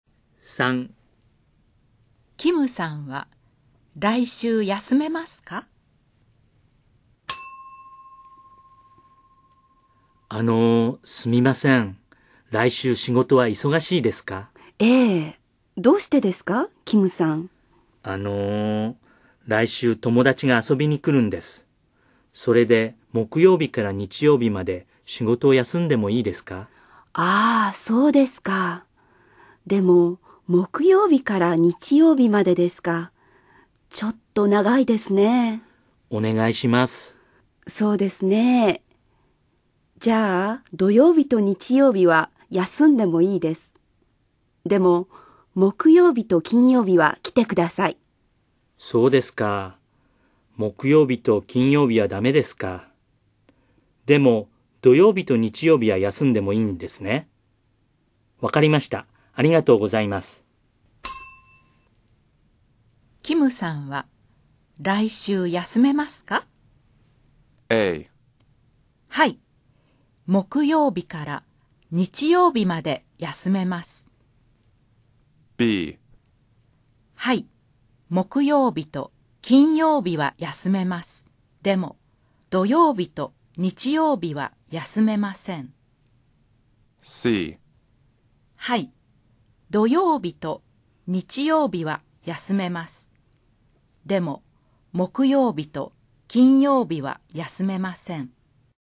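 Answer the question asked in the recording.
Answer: C: はい。土曜日と日曜日は休めます。でも木曜日と金曜日は休めません。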